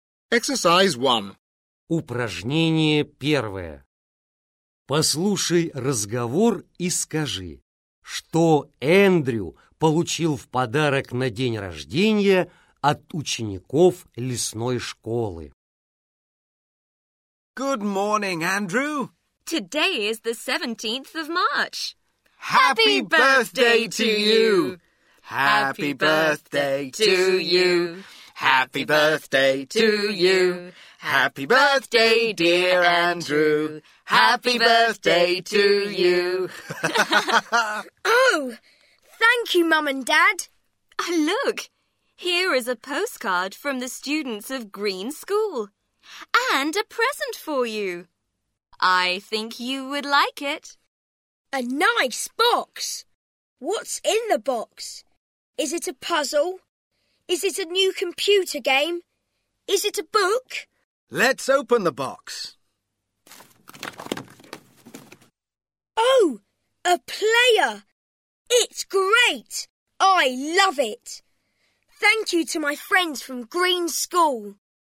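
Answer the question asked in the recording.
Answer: плеер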